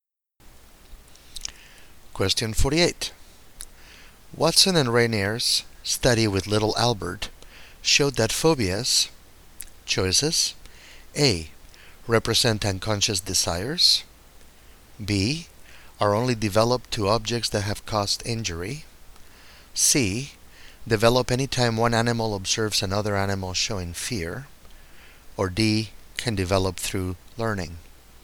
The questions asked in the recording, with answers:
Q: Watson and Rainier's study with little Albert showed that phobias,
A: The correct choice here is D.